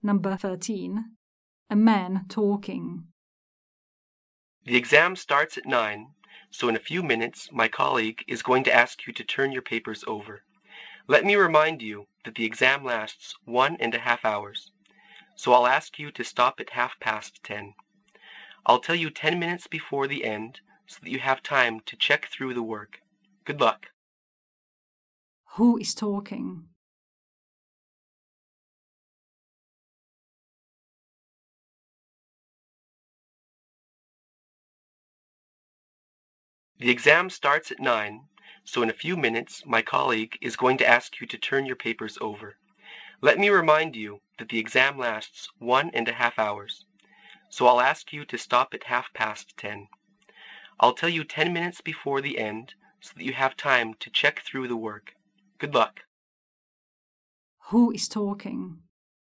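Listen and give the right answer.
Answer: An exam supervisor (invigilator)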